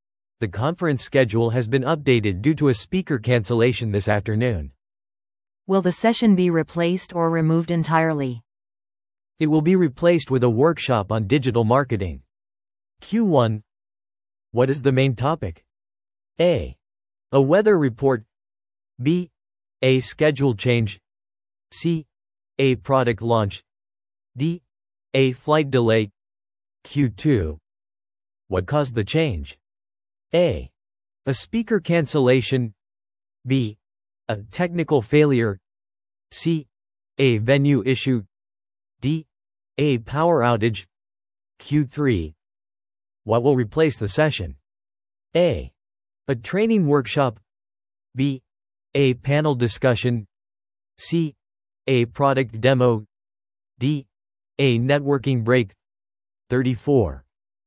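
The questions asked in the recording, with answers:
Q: What is the main topic?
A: B: A schedule change.

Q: What caused the change?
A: A: A speaker cancellation.

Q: What will replace the session?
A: A: A training workshop.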